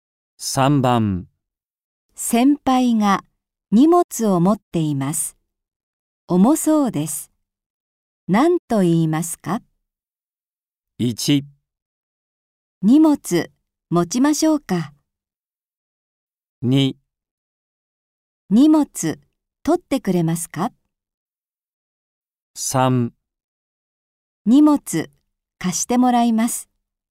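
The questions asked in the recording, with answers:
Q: 先輩が荷物を持っています。重そうです。何と言いますか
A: 1: 荷物持ちましょうか。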